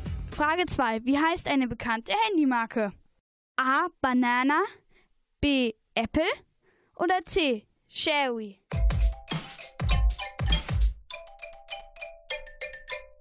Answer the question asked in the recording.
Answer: Richtig ist die Antwort B.